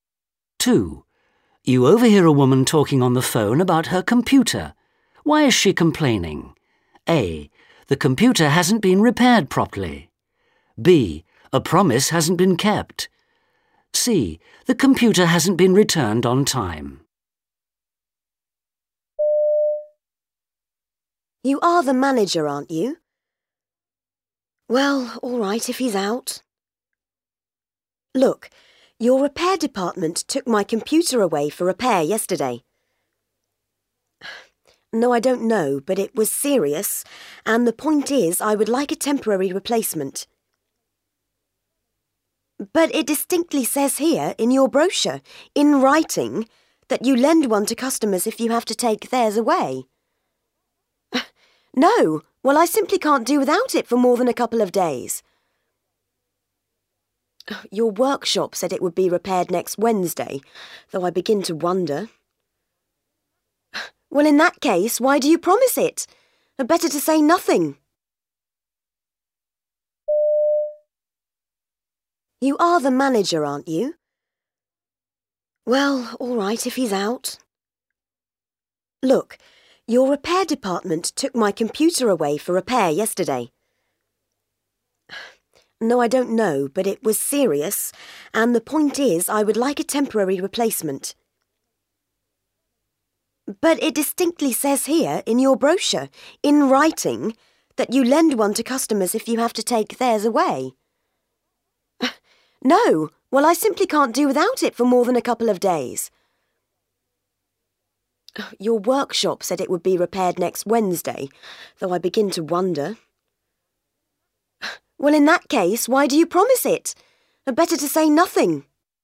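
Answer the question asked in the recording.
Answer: B: A promise hasn't been kept.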